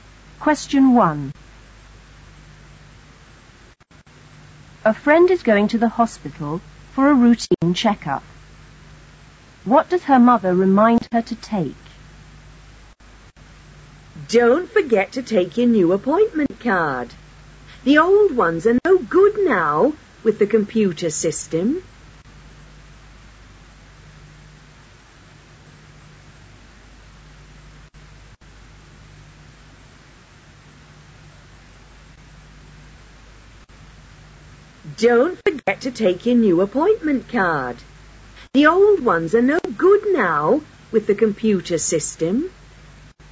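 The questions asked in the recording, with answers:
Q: What does her mother remind her to take?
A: Her new appointment card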